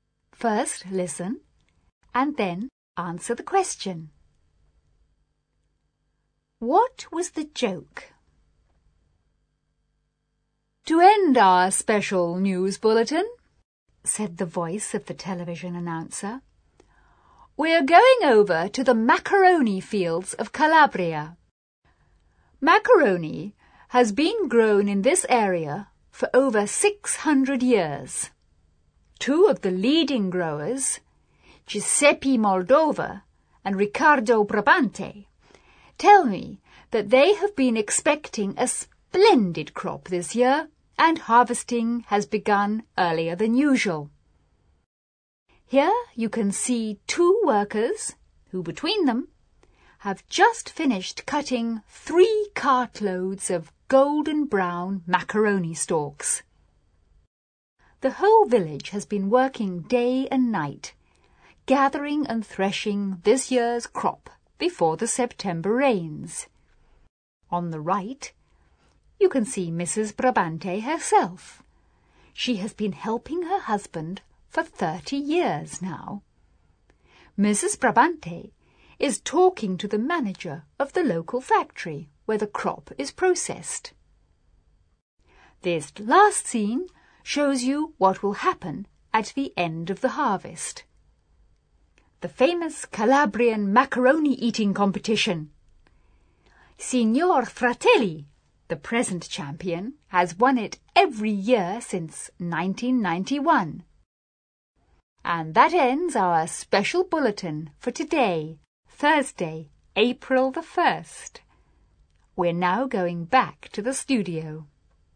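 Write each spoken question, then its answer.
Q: What was the joke?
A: The bulletin pretended macaroni grows as a crop in fields and is harvested, as an April Fool's joke.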